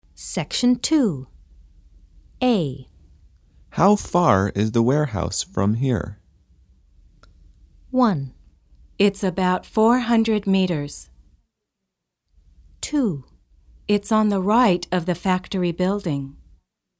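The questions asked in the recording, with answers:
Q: How far is the warehouse from here?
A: 1: It's about 400 meters.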